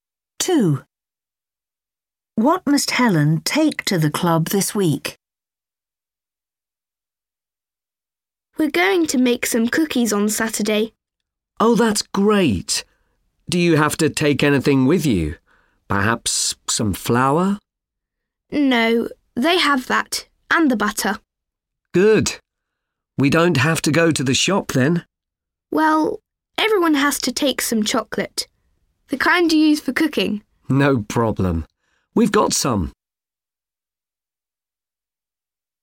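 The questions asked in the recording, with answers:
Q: What must Helen take to the club this week?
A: chocolate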